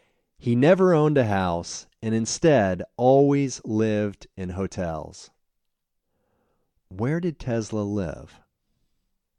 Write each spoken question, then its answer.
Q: Where did Tesla live?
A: He always lived in hotels.